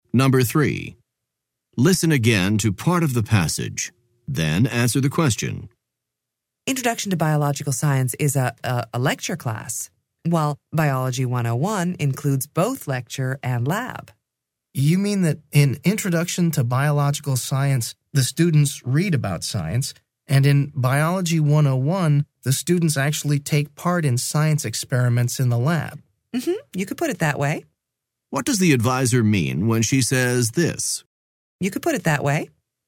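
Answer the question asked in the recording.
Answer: She agrees that the student's description of the difference between the two classes is basically correct.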